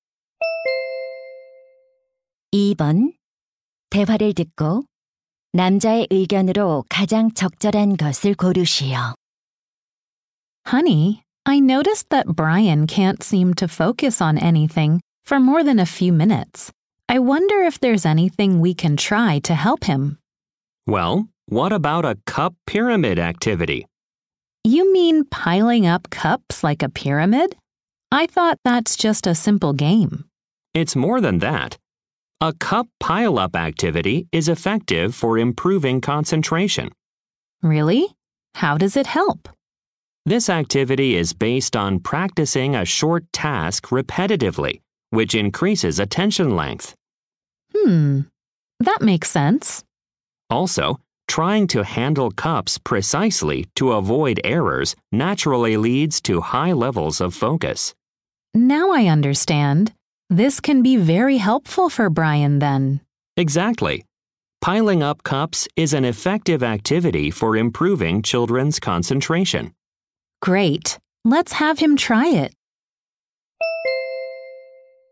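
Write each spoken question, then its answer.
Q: 대화를 듣고 남자의 의견으로 가장 적절한 것을 고르시오.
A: 컵 쌓기 활동은 아이들의 집중력 향상에 효과적이다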